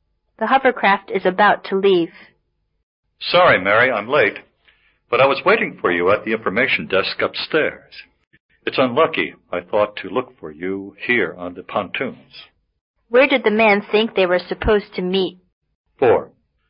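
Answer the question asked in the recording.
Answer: At the information desk upstairs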